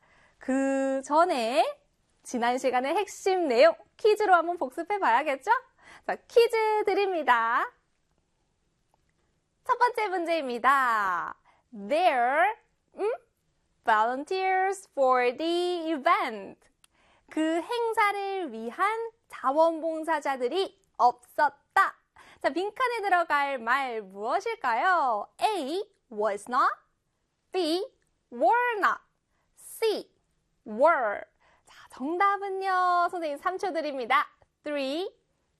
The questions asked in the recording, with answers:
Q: 자, 빈칸에 들어갈 말 무엇일까요?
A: B의 were not입니다.